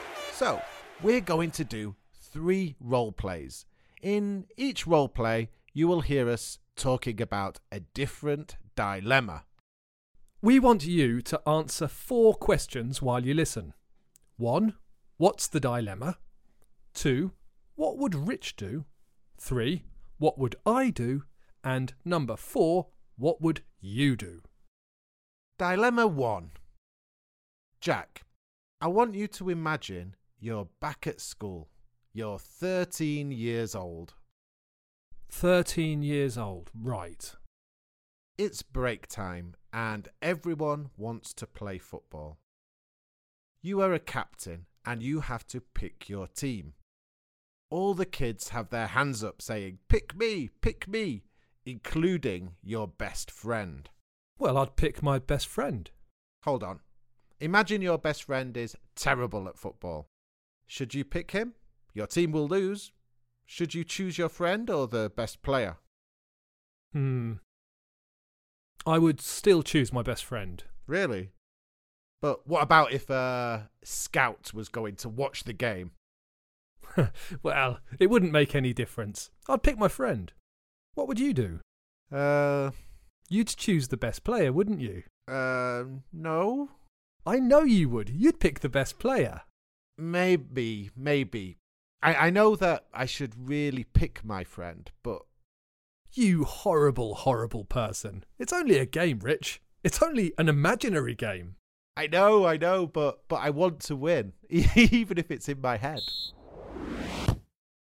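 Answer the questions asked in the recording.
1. Whether to pick his best friend, who is terrible at football, or the best player for his team
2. Pick the best player
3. Pick his best friend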